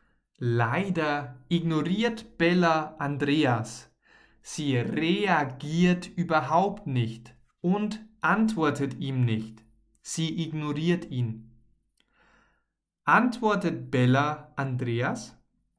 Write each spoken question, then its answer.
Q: Antwortet Bella Andreas?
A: Nein, Bella antwortet Andreas nicht.